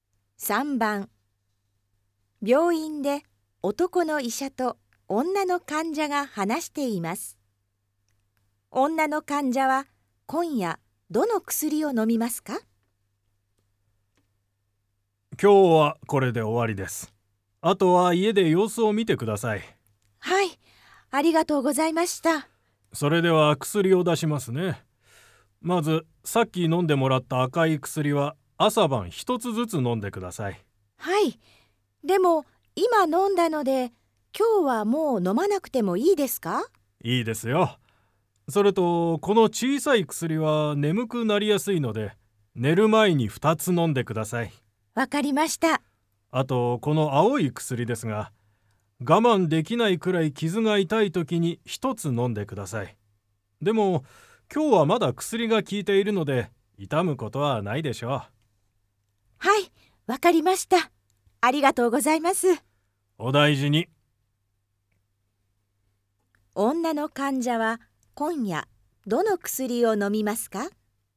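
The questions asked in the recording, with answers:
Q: 女の患者は今夜どの薬を飲みますか?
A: 小さい薬を二つ(寝る前に)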